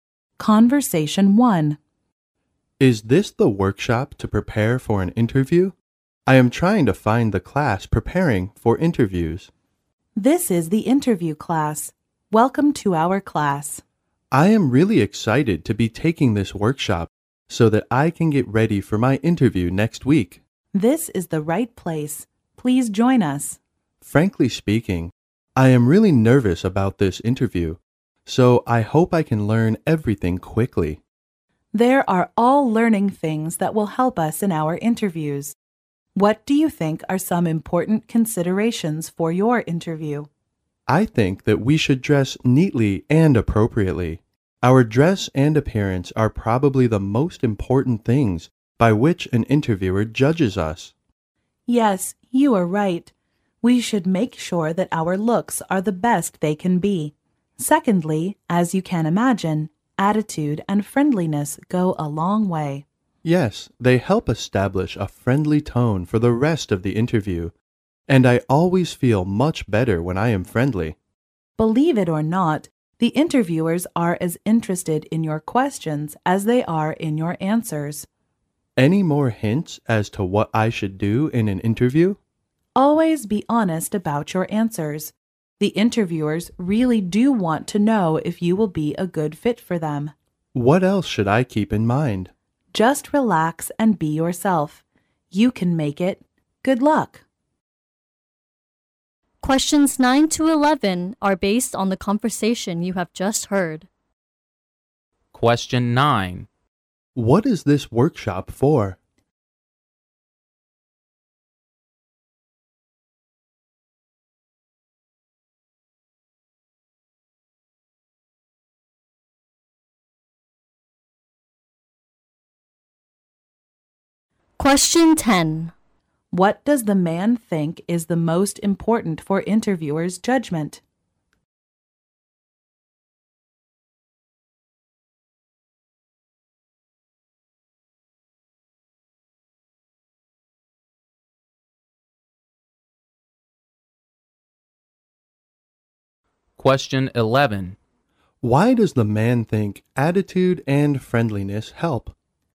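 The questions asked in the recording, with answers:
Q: What is this workshop for?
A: Preparing for job interviews.

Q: What does the man think is the most important for interviewers' judgment?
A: Dress and appearance.

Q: Why does the man think attitude and friendliness help?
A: They help set a friendly tone for the rest of the interview.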